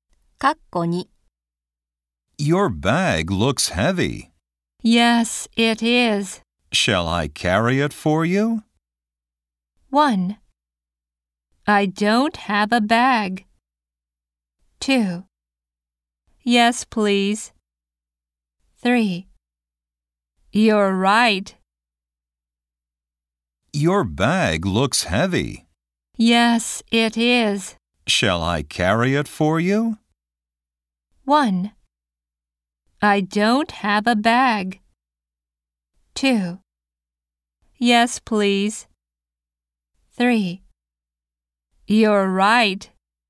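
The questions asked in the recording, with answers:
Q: Shall I carry it for you?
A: 2: Yes, please.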